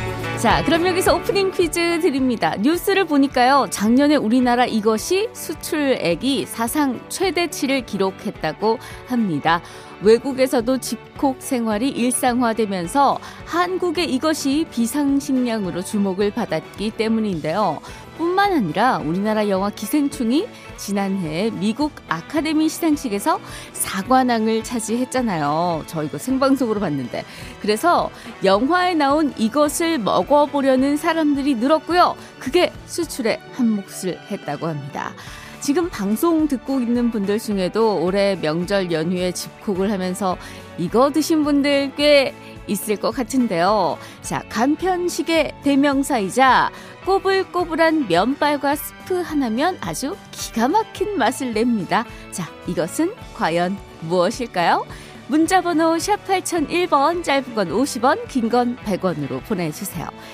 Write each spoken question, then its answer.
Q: 자, 이것은 과연 무엇일까요?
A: 라면이지요.